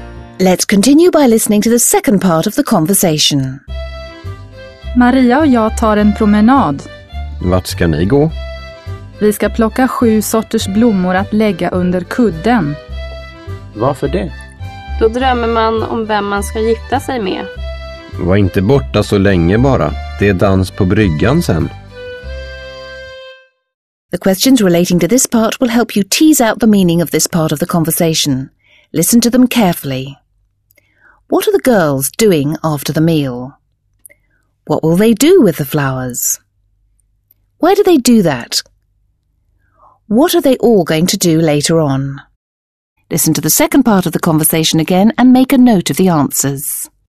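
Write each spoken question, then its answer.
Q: What are the girls doing after the meal?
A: Going for a walk to pick seven kinds of flowers

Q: What will they do with the flowers?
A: Put them under their pillows

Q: Why do they do that?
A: So they dream about who they will marry

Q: What are they all going to do later on?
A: Dance on the jetty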